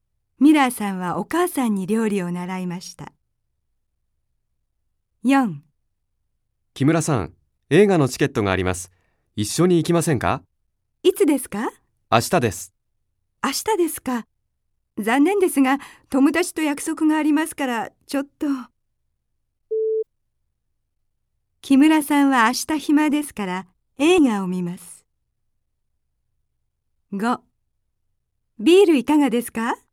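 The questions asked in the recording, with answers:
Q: 木村さんは明日暇ですから、映画を見ます。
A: ×(友達と約束があります)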